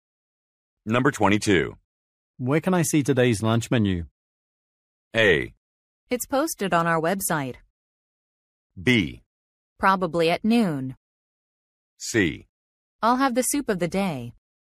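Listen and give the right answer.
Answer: A: It's posted on our website.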